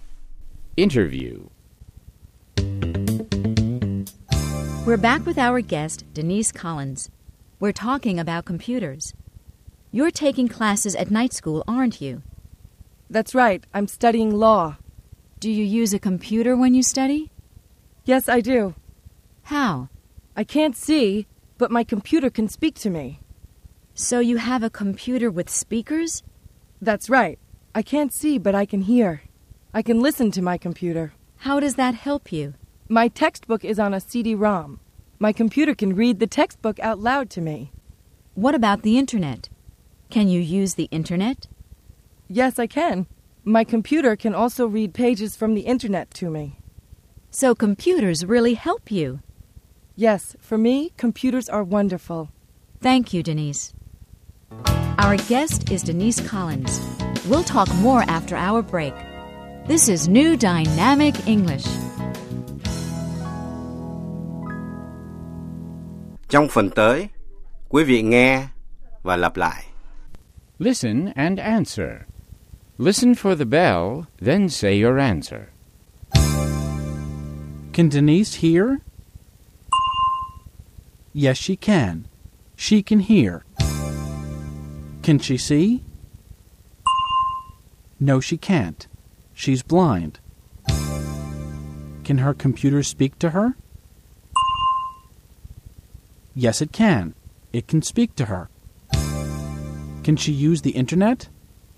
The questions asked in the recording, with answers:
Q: Can Denise hear?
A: Yes, she can.

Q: Can she see?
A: No, she can't. She's blind.

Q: Can she use the internet?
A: Yes, she can. She can use the internet.